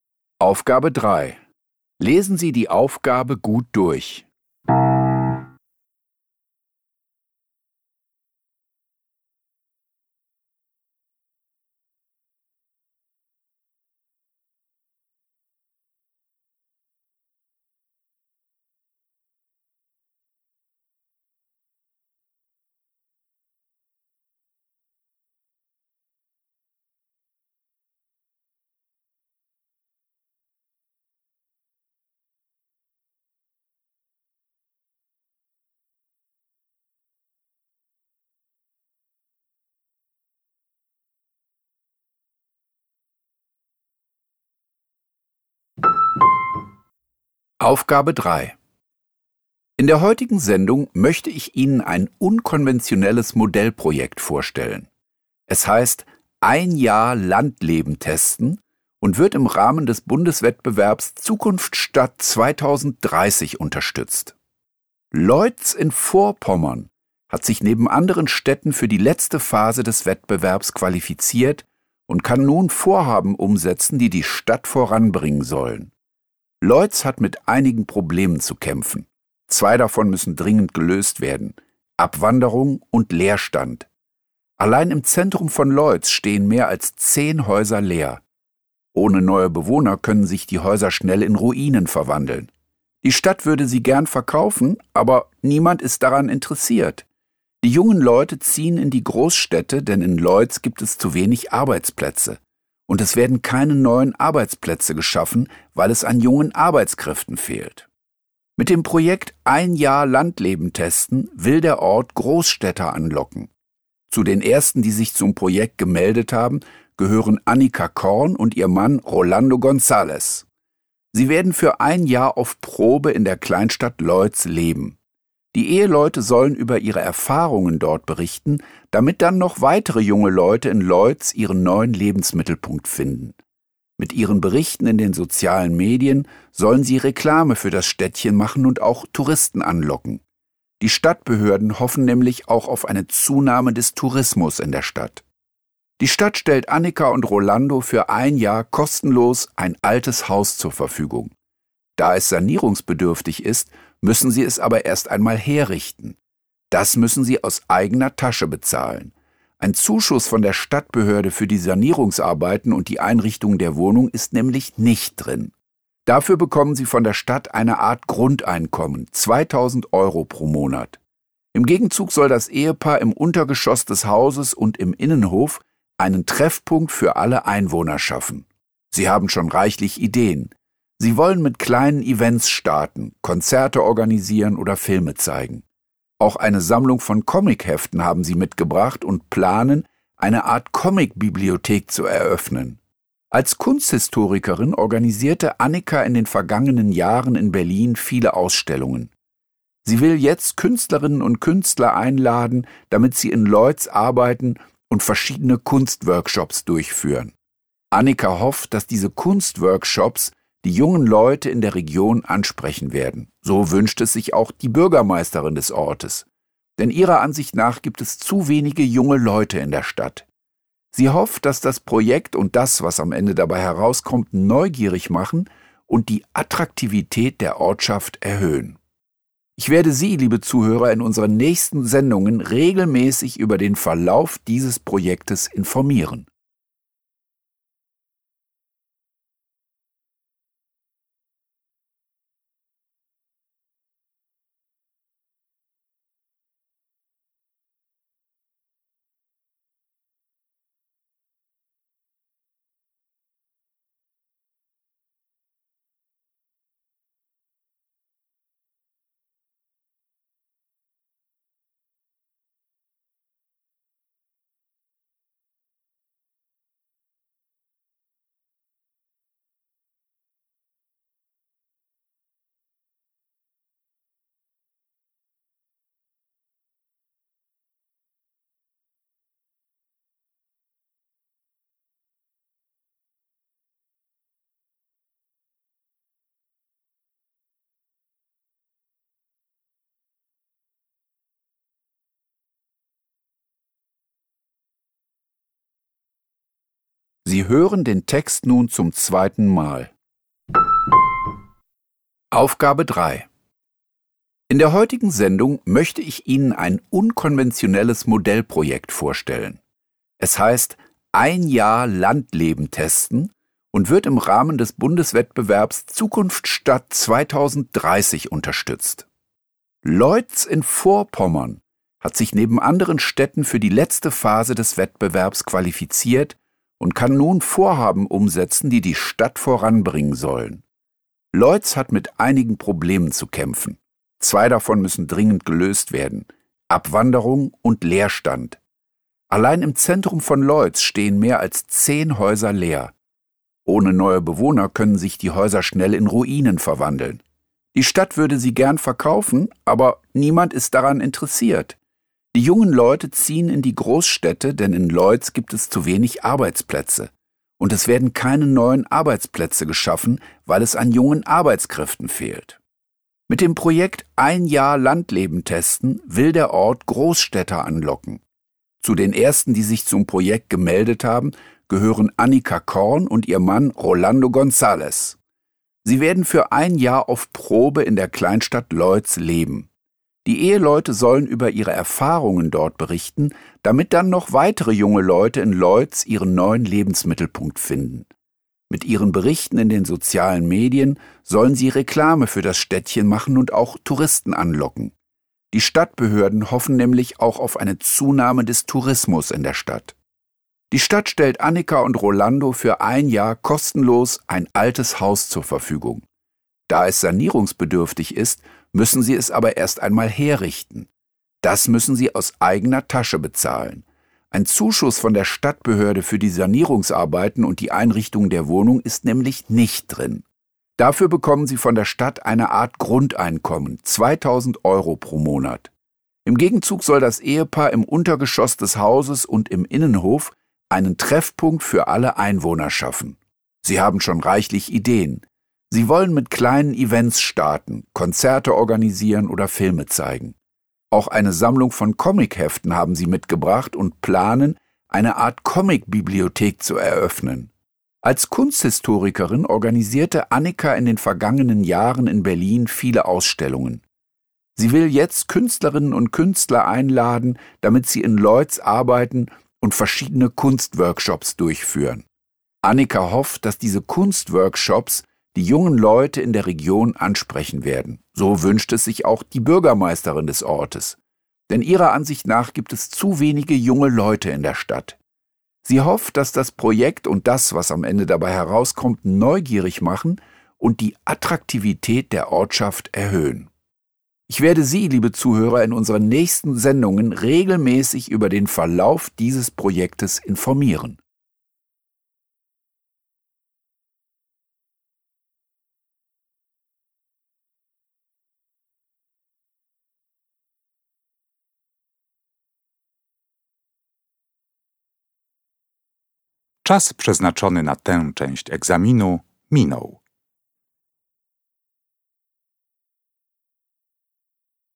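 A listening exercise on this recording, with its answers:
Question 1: Wenn sich die Situation nicht ändert, 3.1 .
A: können sich die Häuser schnell in Ruinen verwandeln

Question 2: Sie werden auf Probe in Loitz wohnen und 3.2 .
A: in den sozialen Medien über ihre Erfahrungen berichten

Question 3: Außerdem bekommen sie 3.3 .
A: eine Art Grundeinkommen von 2.000 Euro pro Monat

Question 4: Besonders den jungen Leuten in der Region will Annika ein Angebot machen, nämlich 3.4 .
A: Kunstworkshops mit eingeladenen Künstlern

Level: Poziom: dwujęzyczny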